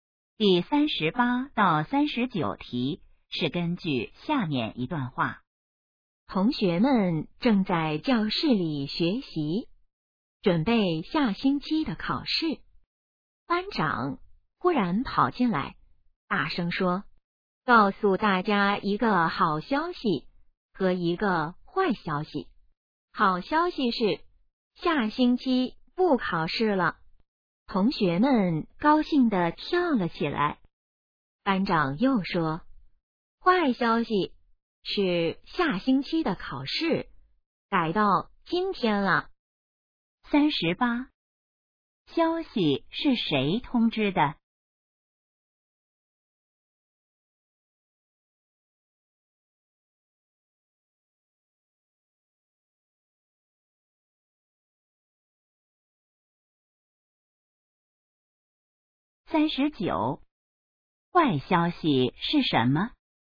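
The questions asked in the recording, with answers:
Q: 消息是谁通知的?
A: 班长

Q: 坏消息是什么?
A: 下星期的考试改到今天了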